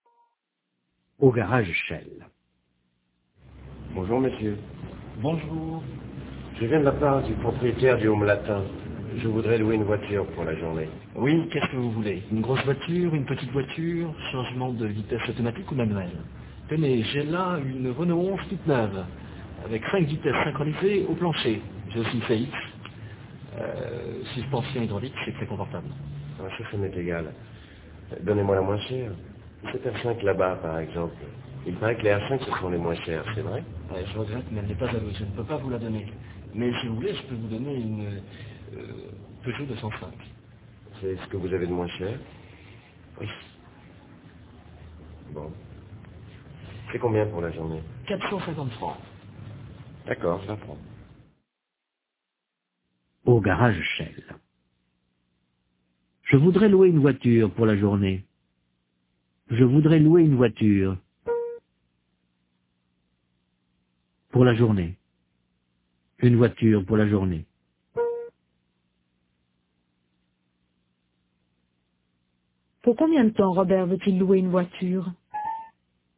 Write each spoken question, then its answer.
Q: Pour combien de temps Robert veut-il louer une voiture?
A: Pour la journée.